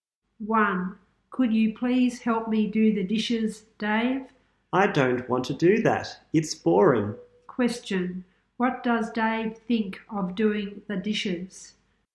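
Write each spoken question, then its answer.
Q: What does Dave think of doing the dishes?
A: It's boring.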